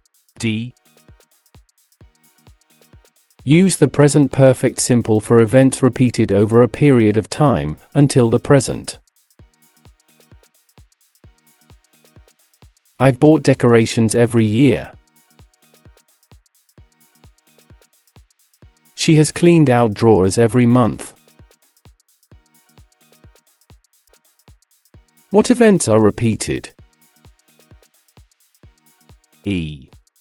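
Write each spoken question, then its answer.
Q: What events are repeated?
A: Buying decorations every year and cleaning out drawers every month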